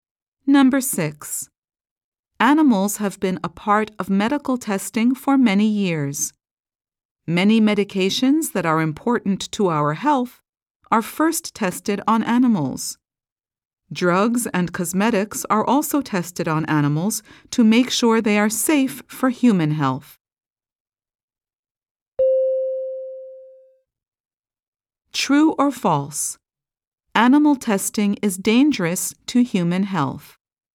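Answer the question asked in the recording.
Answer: False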